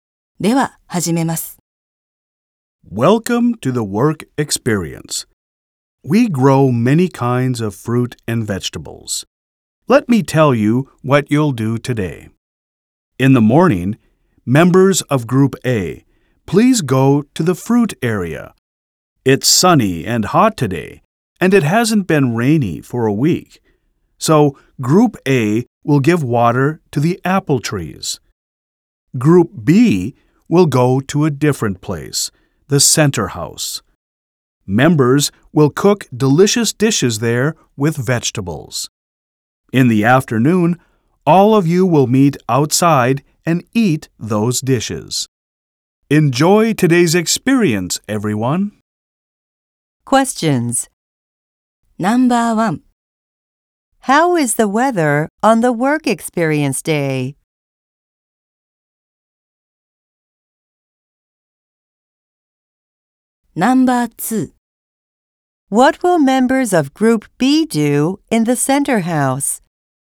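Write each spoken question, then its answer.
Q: How is the weather on the work experience day?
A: It's sunny and hot.

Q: What will members of Group B do in the center house?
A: They will cook delicious dishes with vegetables.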